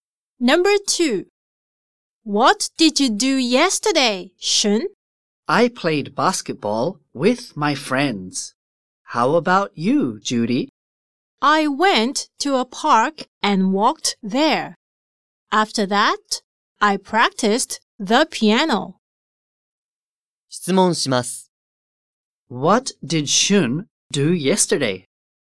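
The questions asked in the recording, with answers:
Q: What did Shun do yesterday?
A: He played basketball with his friends.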